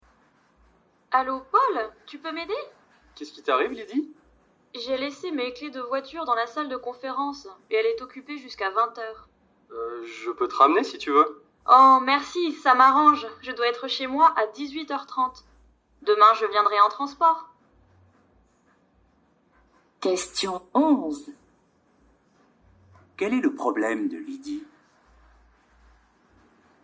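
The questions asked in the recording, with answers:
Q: Quel est le problème de Lydie?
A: Elle a laissé ses clés de voiture dans la salle de conférence, occupée jusqu'à 20 h.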